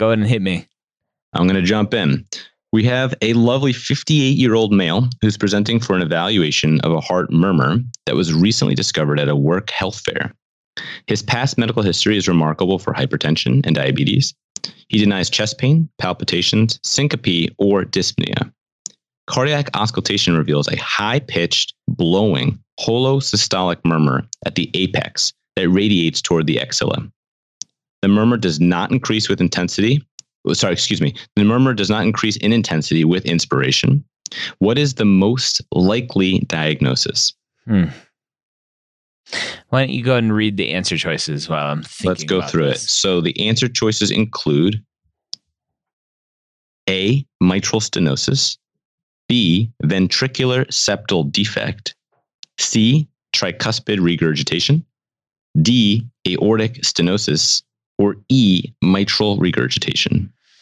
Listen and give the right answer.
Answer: In this actual case, this one is going to be E, mitral regurgitation.